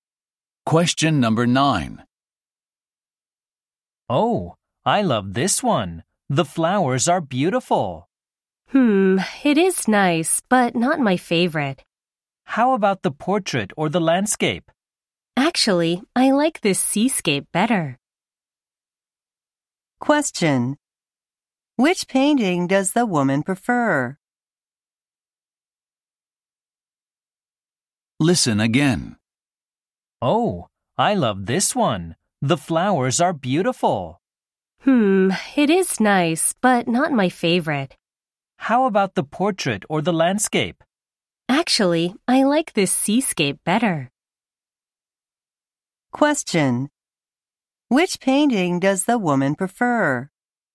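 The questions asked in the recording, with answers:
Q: Which painting does the woman prefer?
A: The seascape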